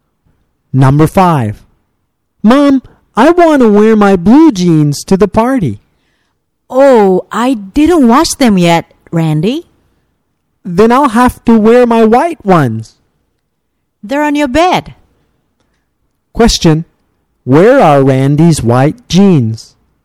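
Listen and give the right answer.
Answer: On his bed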